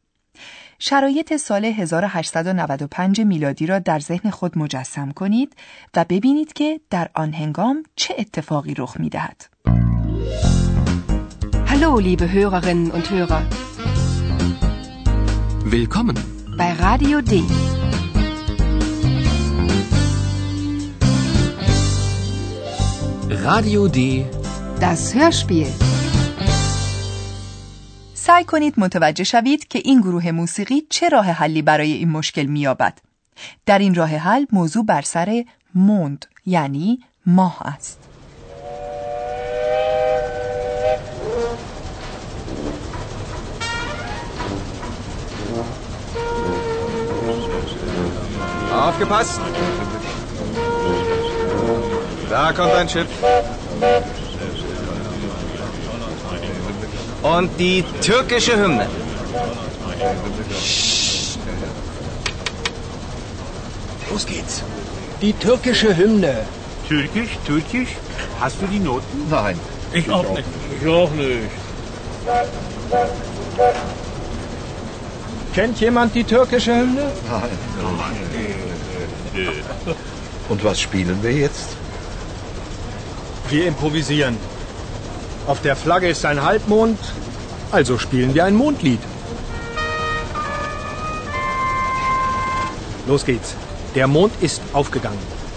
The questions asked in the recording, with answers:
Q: سعی کنید متوجه شوید که این گروه موسیقی چه راه حلی برای این مشکل میابد.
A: شاید متوجه شدید نوازندگان راه حل را در داه نواختن مییابند